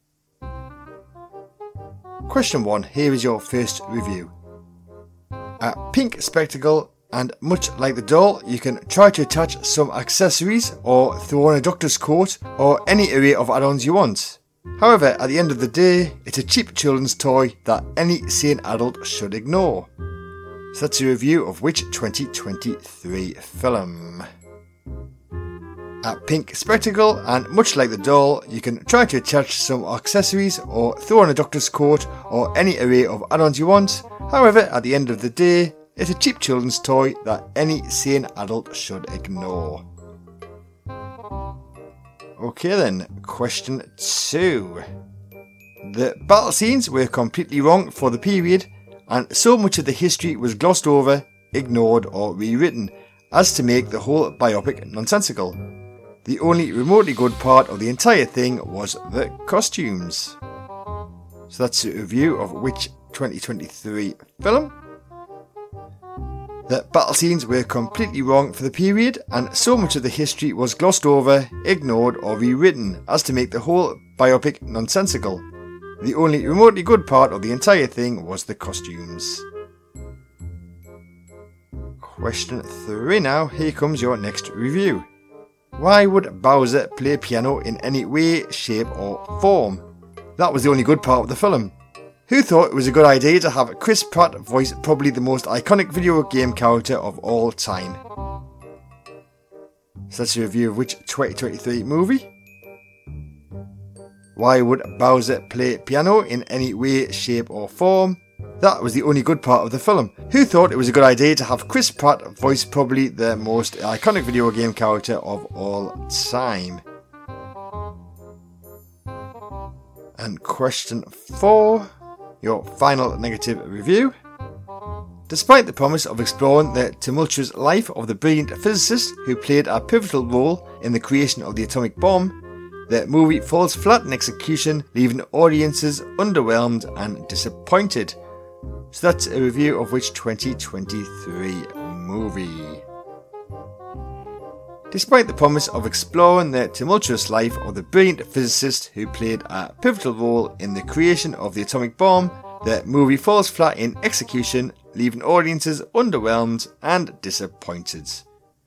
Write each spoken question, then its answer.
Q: So that's a review of which 2023 film?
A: That is a review of Barbie.

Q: So that's a review of which 2023 film?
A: That's Napoleon.

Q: So that's a review of which 2023 movie?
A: That was the Super Mario Bros.

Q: So that's a review of which 2023 movie?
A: That was a review of Oppenheimer.